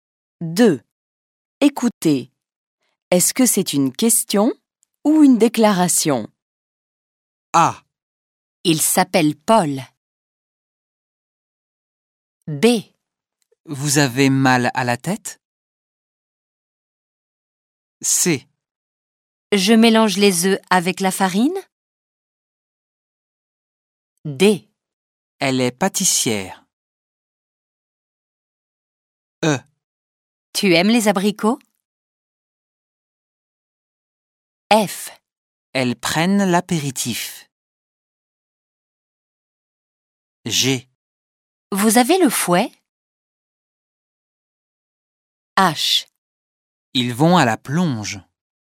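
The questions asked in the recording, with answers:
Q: Est-ce que c'est une question ou une déclaration?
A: déclaration

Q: Est-ce que c'est une question ou une déclaration?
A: question

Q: Est-ce que c'est une question ou une déclaration?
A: question

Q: Est-ce que c'est une question ou une déclaration?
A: déclaration

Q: Est-ce que c'est une question ou une déclaration?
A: question

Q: Est-ce que c'est une question ou une déclaration?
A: déclaration

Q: Est-ce que c'est une question ou une déclaration?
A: question

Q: Est-ce que c'est une question ou une déclaration?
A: déclaration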